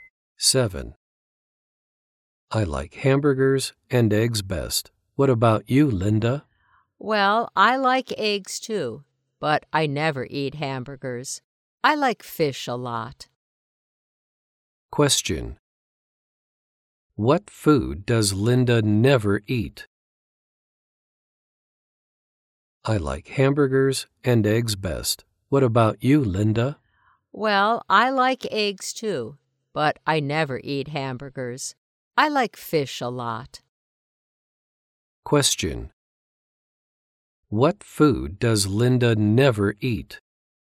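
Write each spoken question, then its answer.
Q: What food does Linda never eat?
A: Hamburgers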